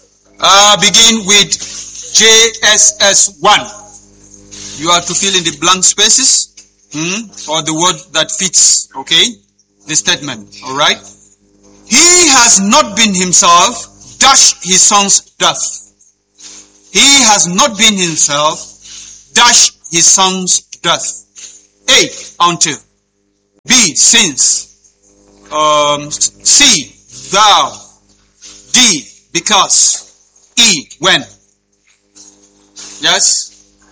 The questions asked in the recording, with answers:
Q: He has not been himself, dashed his son's death.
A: That is the correct answer.